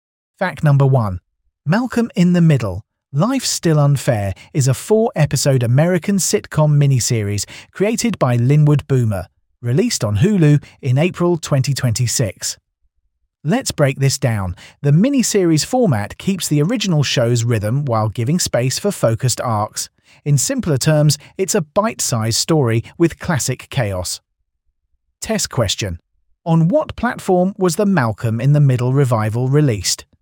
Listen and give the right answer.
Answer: Correct answer, Hulu.